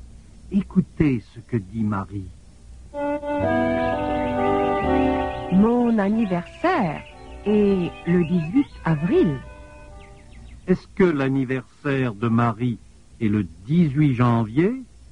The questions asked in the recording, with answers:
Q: Est-ce que l'anniversaire de Marie est le 18 janvier?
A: Non, l'anniversaire de Marie n'est pas le 18 janvier.